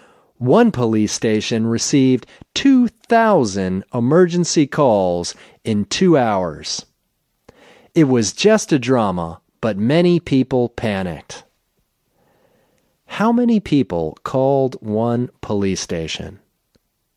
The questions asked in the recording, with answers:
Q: How many people called one police station?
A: One police station received 2,000 emergency calls in 2 hours.